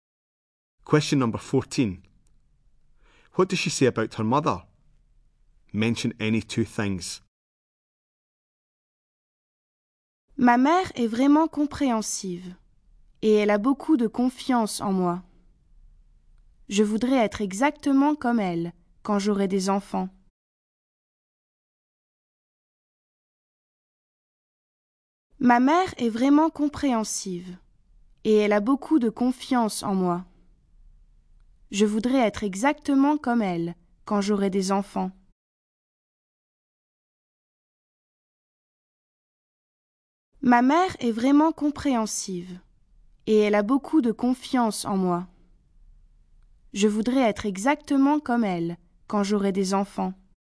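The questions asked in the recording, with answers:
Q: What does she say about her mother?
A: Very understanding; trusts her a lot; she wants to be like her when she has children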